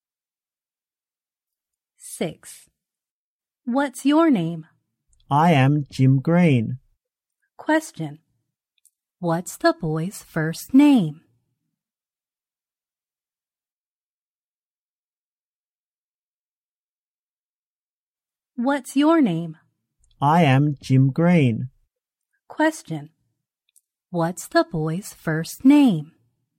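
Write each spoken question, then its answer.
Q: What's the boy's first name?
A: Jim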